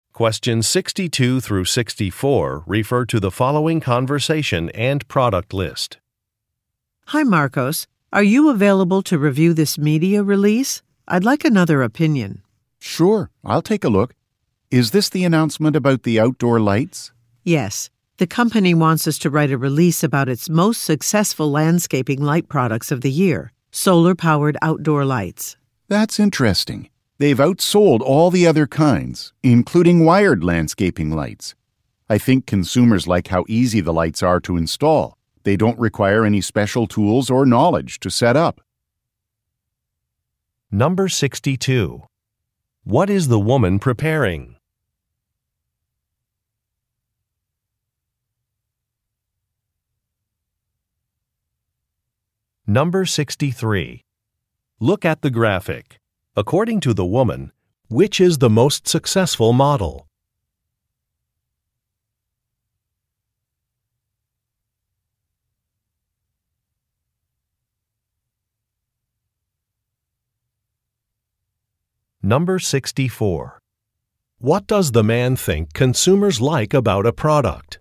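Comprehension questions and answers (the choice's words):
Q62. What is the woman preparing?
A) An owner's manual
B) A media release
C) A financial report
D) A questionnaire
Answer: A media release

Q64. What does the man think consumers like about a product?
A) It has an extended warranty.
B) It is widely available.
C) It is easy to install.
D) It is reasonably priced.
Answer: It is easy to install.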